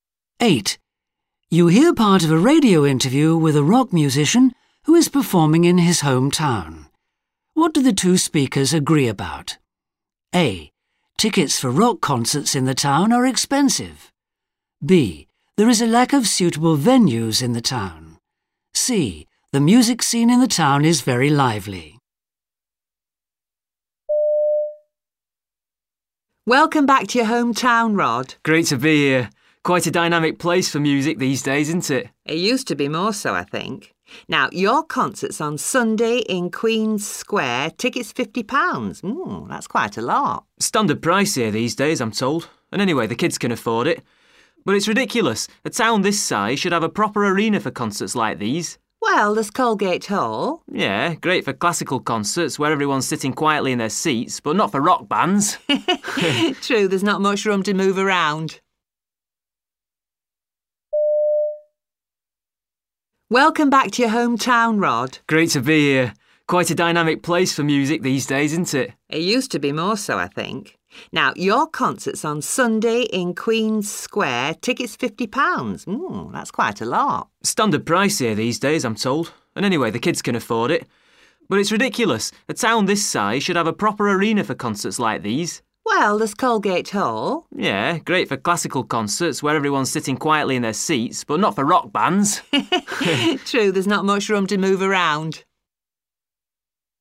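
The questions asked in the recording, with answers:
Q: What do the two speakers agree about?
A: B: There is a lack of suitable venues in the town.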